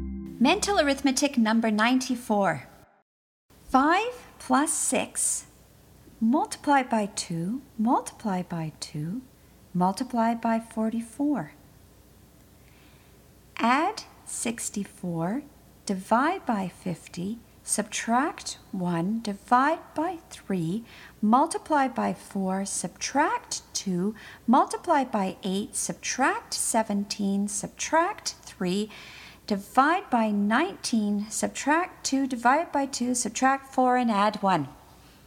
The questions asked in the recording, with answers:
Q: 5 plus 6, multiply by 2, multiply by 2, multiply by 44. Add 64, divide by 50, subtract 1, divide by 3, multiply by 4, subtract 2, multiply by 8, subtract 17, subtract 3, divide by 19, subtract 2, divide by 2, subtract 4, and add 1.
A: And the answer is 6.